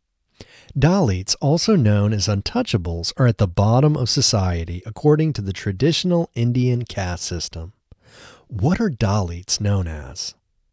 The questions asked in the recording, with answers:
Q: What are Dalits known as?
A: Dalits are also known as untouchables.